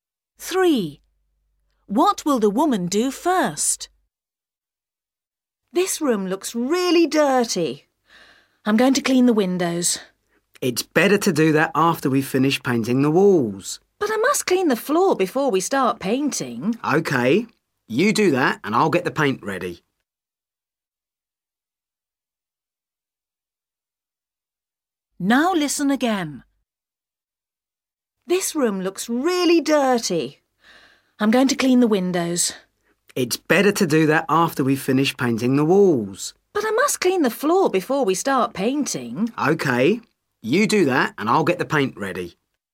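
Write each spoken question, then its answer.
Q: What will the woman do first?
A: clean the floor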